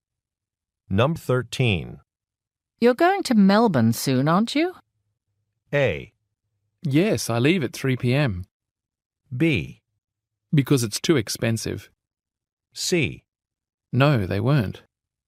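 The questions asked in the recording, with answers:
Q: You're going to Melbourne soon, aren't you?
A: A: Yes, I leave at 3 p.m.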